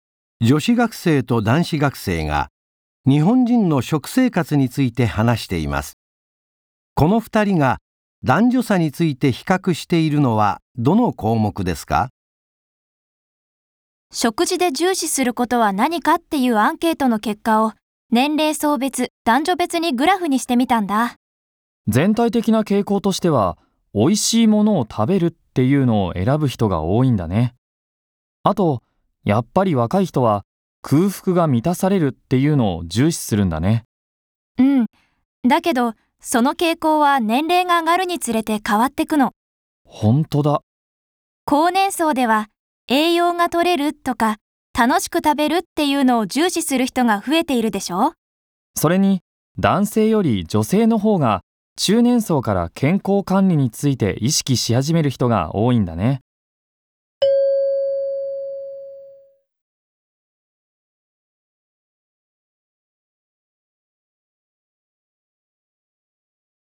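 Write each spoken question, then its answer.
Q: この2人が男女差について比較しているのはどの項目ですか?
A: 健康管理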